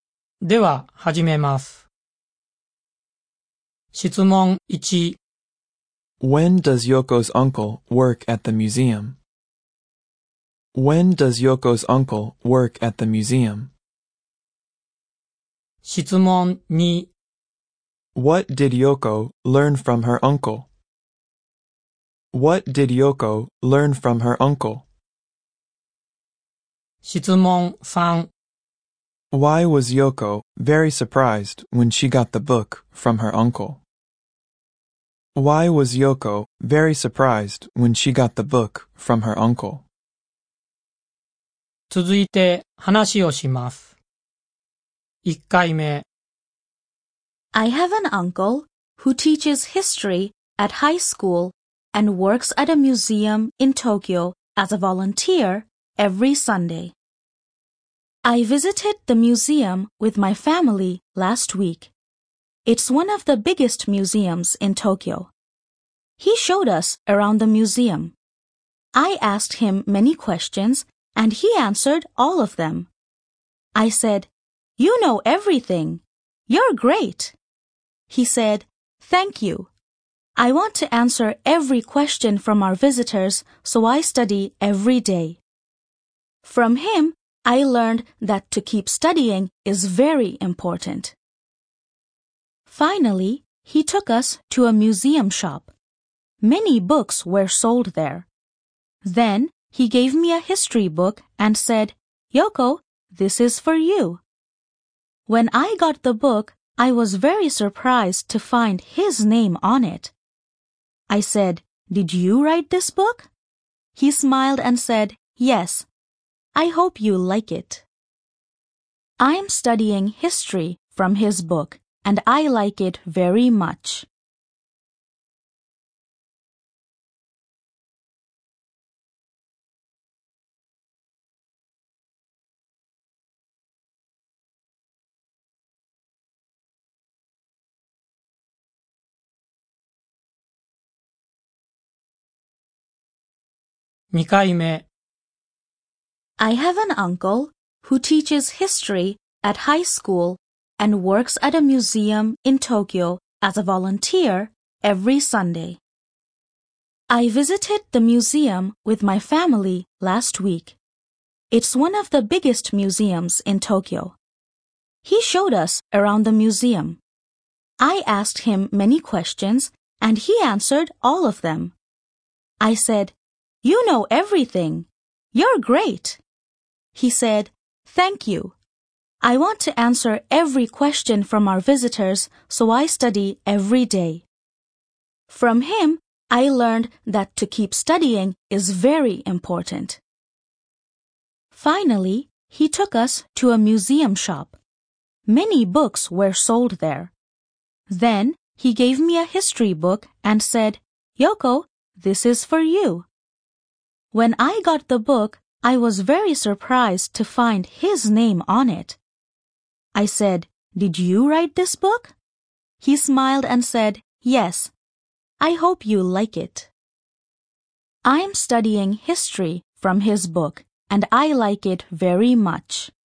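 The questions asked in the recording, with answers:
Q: When does Yoko's uncle work at the museum?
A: Every Sunday

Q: What did Yoko learn from her uncle?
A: That to keep studying is very important

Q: Why was Yoko very surprised when she got the book from her uncle?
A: Because she found his name on it (he wrote the book)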